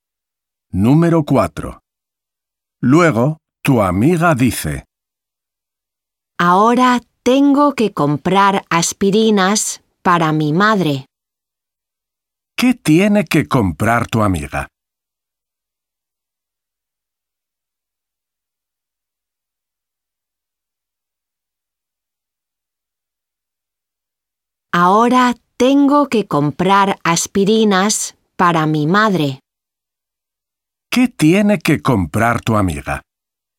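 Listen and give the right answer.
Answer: aspirinas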